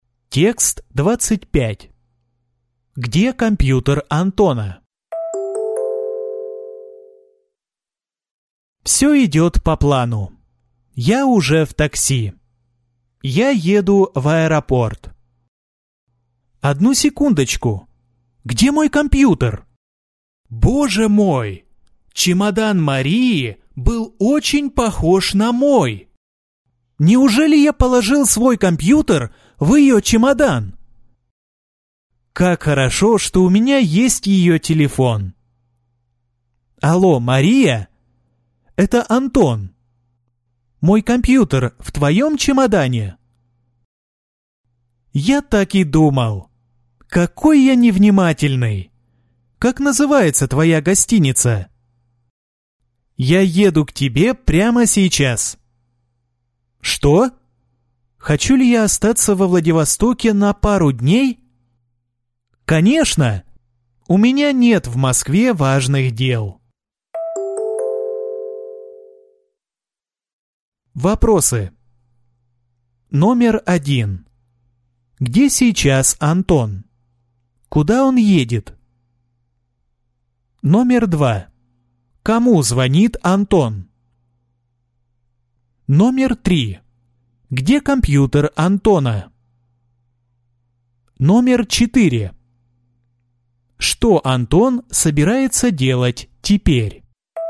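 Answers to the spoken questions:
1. В такси, едет в аэропорт
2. Марии
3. В чемодане Марии
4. Поехать к Марии в гостиницу и остаться во Владивостоке на пару дней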